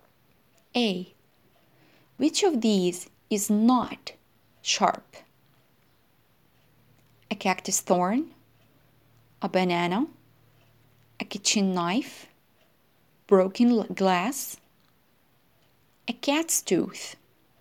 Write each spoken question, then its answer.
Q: Which of these is not sharp?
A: The answer is a banana.